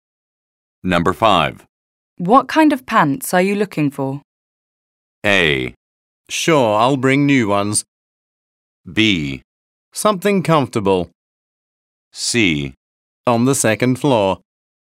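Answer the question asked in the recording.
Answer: B: Something comfortable.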